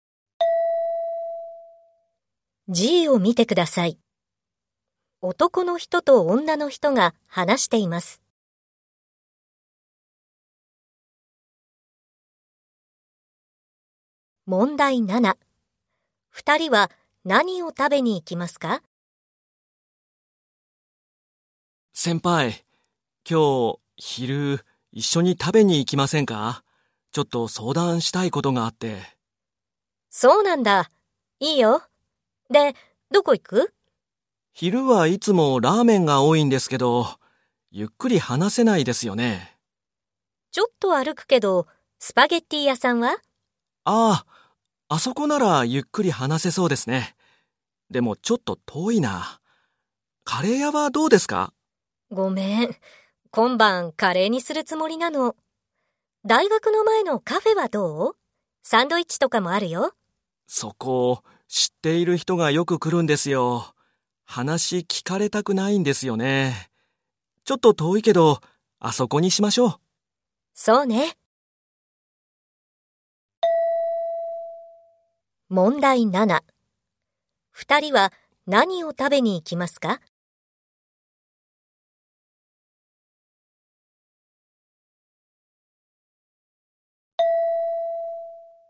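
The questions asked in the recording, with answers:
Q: 二人は何を食べに行きますか?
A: スパゲッティ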